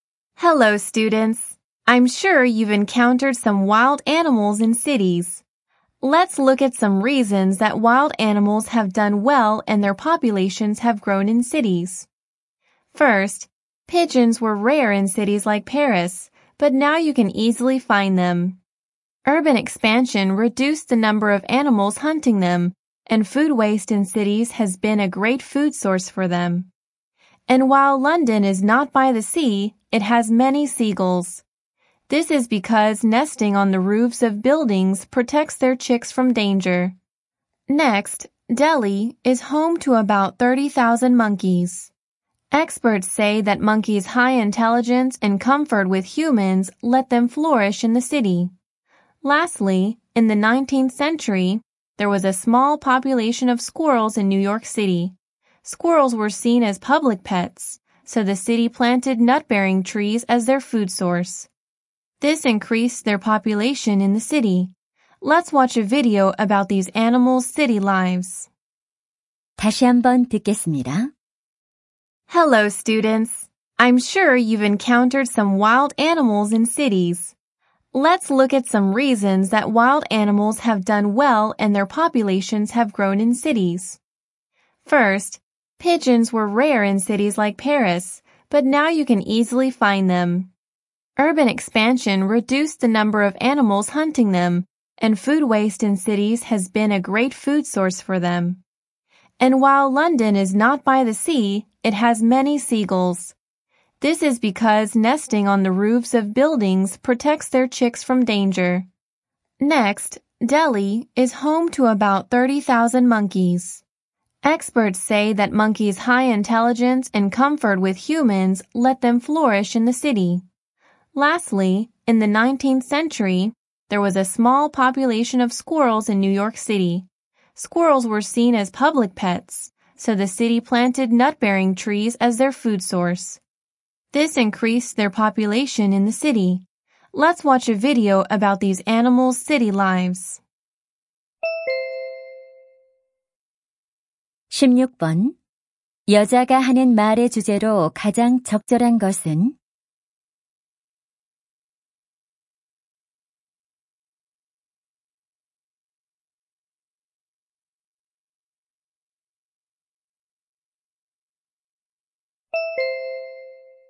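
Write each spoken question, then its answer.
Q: 여자가 하는 말의 주제로 가장 적절한 것은?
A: 야생 동물들이 도시에서 번성하게 된 이유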